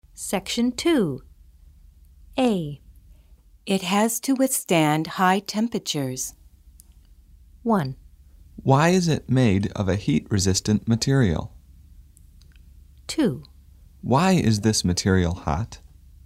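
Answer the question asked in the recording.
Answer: 1: Why is it made of a heat-resistant material?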